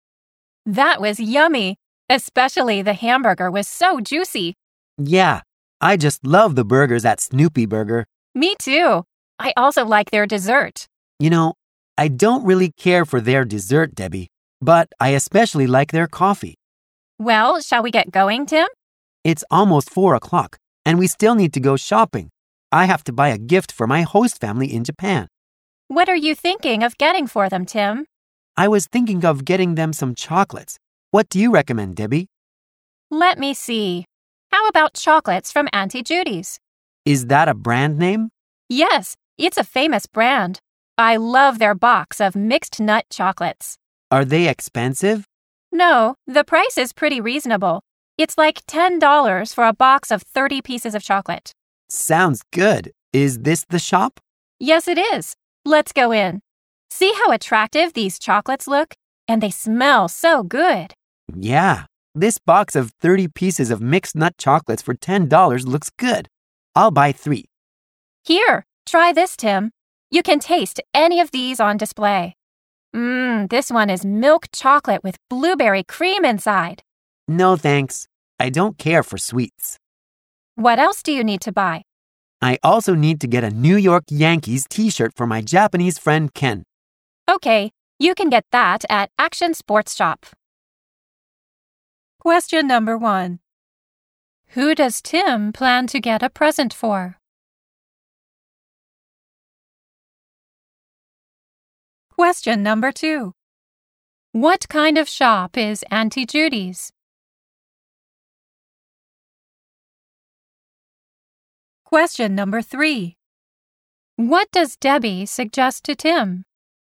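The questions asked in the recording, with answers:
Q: Who does Tim plan to get a present for?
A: His host family in Japan and his Japanese friend Ken

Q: What kind of shop is Auntie Judy's?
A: A chocolate shop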